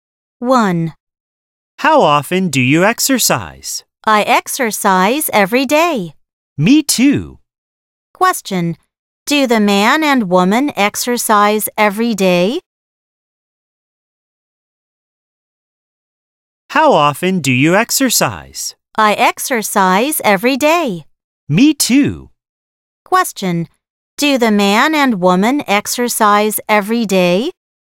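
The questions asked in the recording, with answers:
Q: Do the man and woman exercise every day?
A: Yes, they do.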